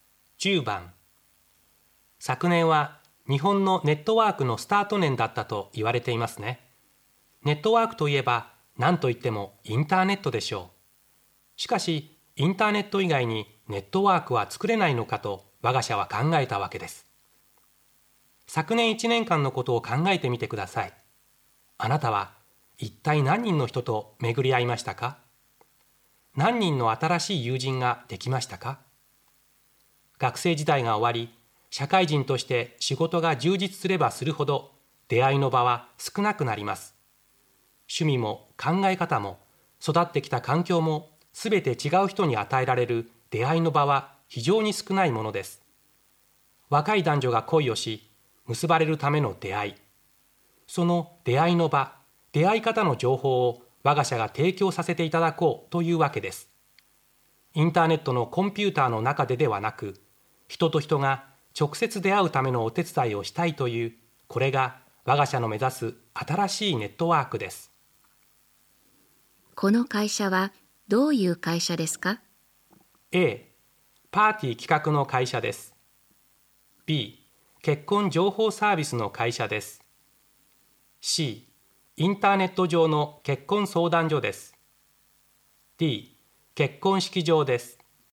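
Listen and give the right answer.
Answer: B: 結婚情報サービスの会社です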